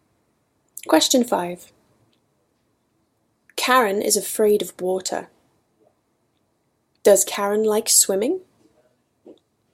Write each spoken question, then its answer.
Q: Does Karen like swimming?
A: No, Karen does not like swimming.